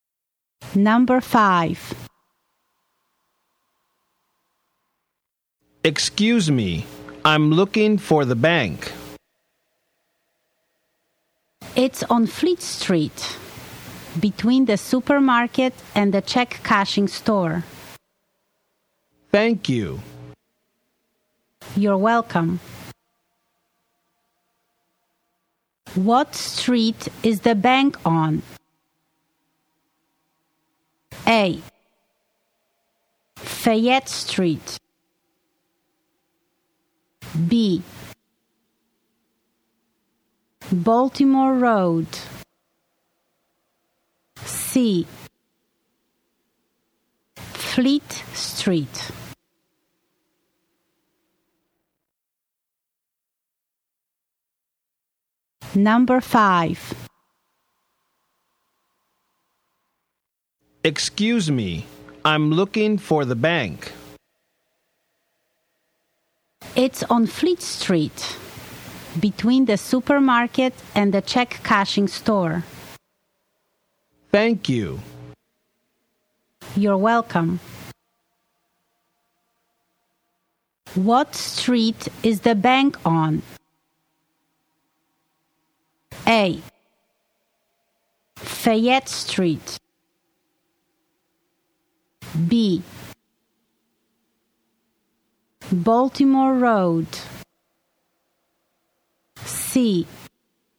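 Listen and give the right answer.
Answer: C: Fleet Street.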